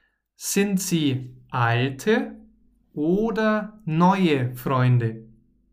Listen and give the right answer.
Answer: Alte. Sie sind alte Freunde.